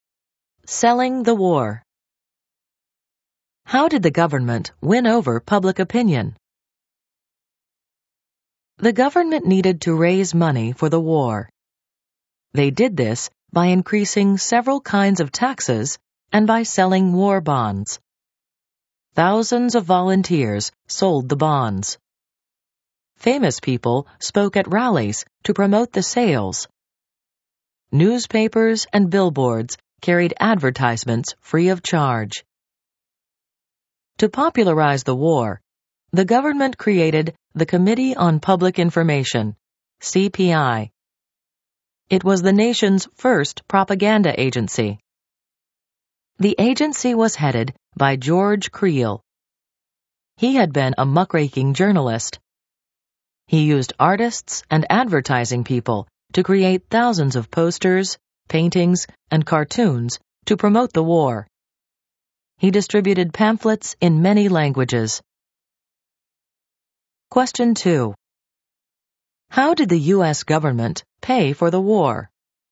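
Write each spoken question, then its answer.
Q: How did the U.S. government pay for the war?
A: By raising taxes and selling war bonds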